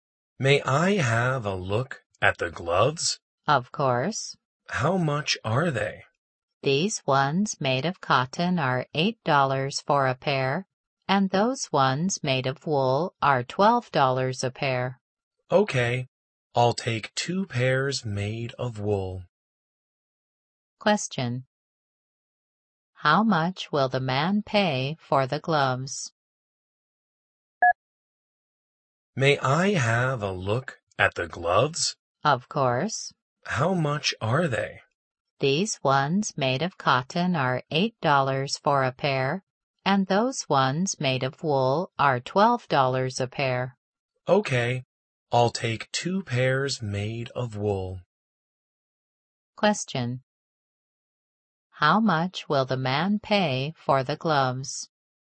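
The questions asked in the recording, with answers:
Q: How much will the man pay for the gloves?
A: $24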